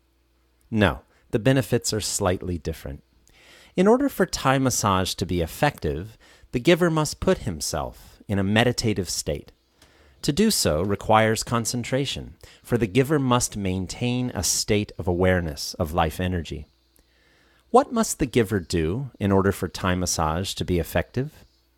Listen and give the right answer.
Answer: The giver must put himself, or herself, in a meditative state for Thai massage to be effective.